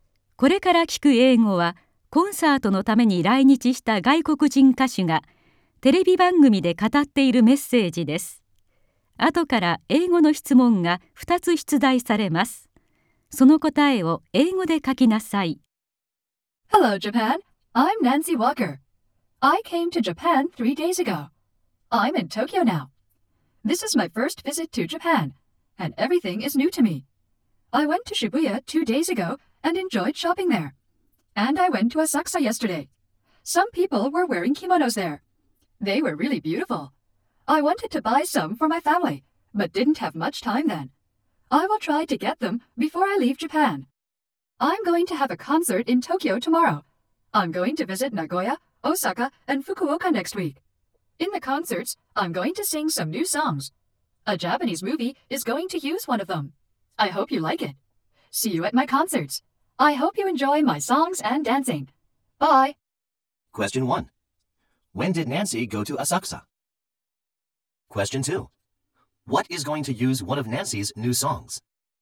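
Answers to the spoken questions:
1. She went there yesterday.
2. A Japanese movie is.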